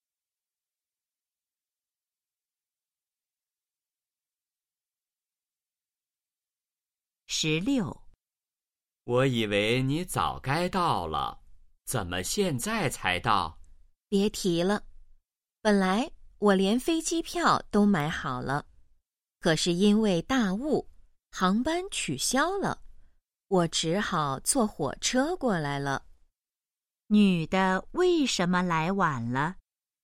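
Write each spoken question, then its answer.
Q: 女的为什么来晚了?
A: 因为大雾航班取消,只好坐火车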